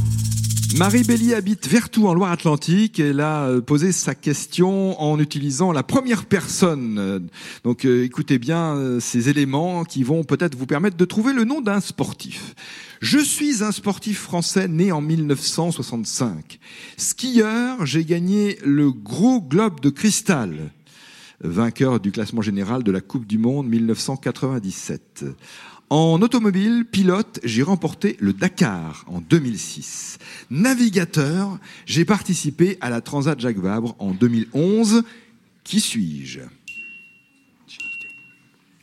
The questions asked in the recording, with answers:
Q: Qui suis-je ?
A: C'est Luc Alphand.